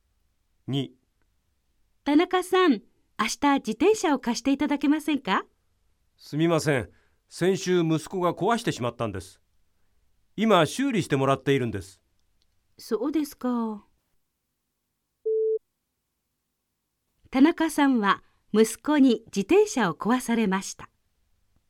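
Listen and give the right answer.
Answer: 正しい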